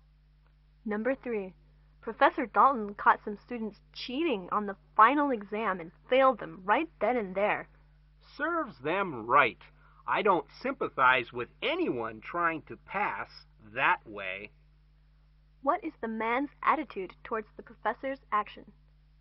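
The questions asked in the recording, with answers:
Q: What is the man's attitude towards the professor's action?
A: He approves of it.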